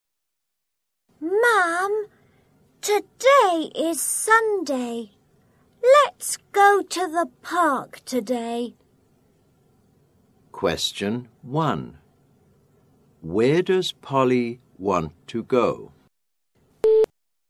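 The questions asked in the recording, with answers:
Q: Where does Polly want to go?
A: to the park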